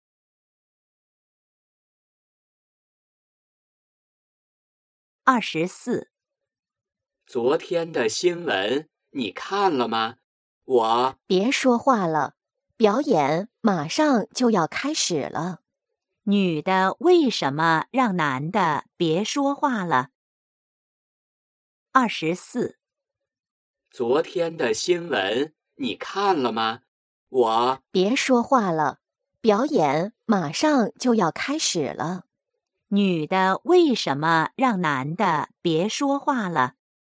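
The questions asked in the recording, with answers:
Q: 女的为什么让男的别说话了?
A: 表演马上就要开始了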